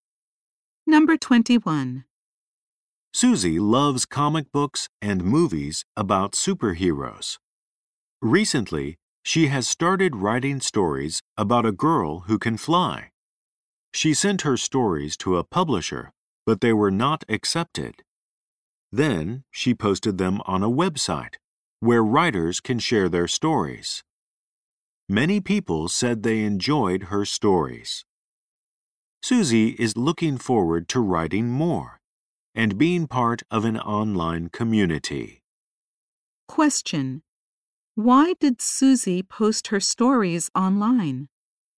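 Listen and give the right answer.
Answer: A publisher did not accept her stories.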